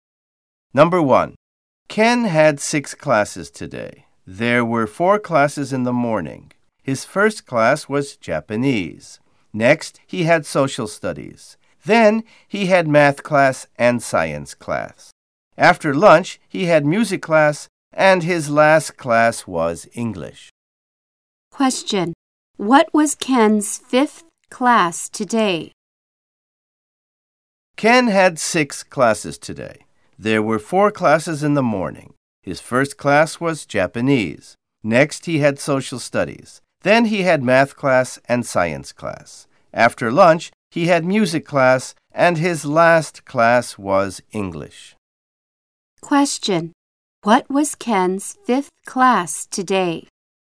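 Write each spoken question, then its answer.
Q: What was Ken's 5th class today?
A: Music class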